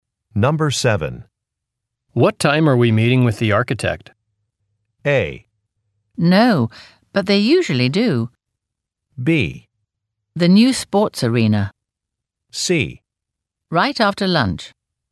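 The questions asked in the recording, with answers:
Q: What time are we meeting with the architect?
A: C: Right after lunch.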